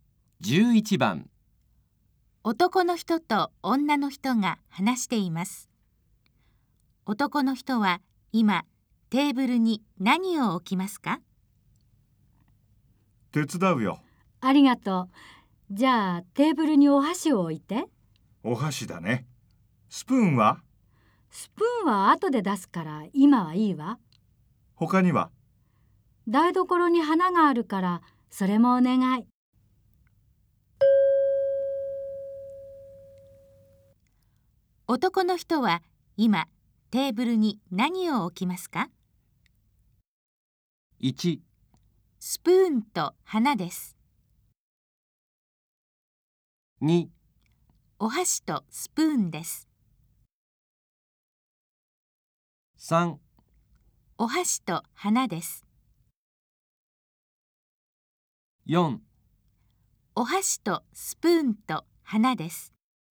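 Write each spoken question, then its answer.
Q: 男の人は今テーブルに何を置きますか?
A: 3: お箸と花です。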